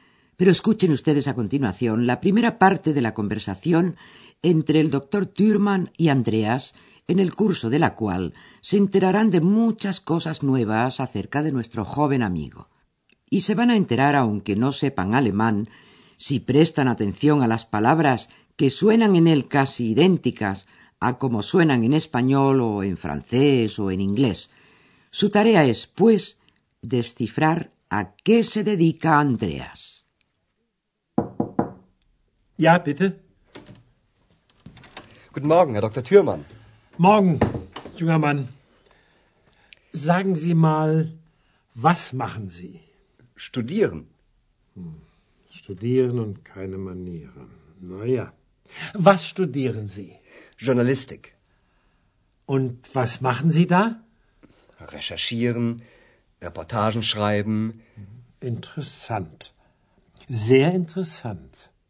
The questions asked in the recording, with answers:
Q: Su tarea es, pues, descifrar a qué se dedica Andreas.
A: Andreas estudia journalistic, es decir, periodismo.